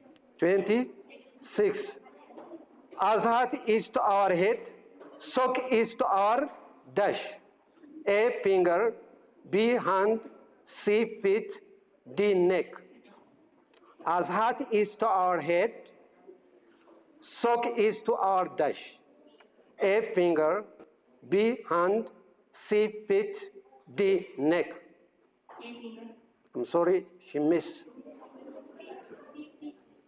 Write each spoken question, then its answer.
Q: Azhat is to our head, sock is to our dash.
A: C, feet.